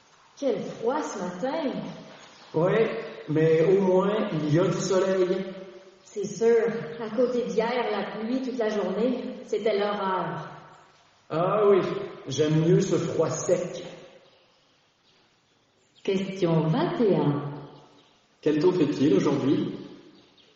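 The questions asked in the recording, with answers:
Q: Quel temps fait-il aujourd'hui?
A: Il fait froid et sec, avec du soleil.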